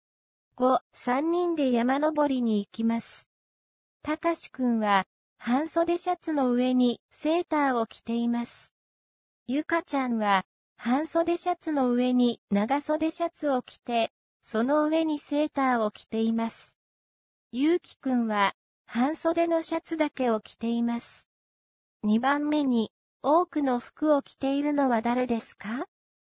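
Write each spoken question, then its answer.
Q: 2番目に、多くの服を着ているのは誰ですか?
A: たかしくん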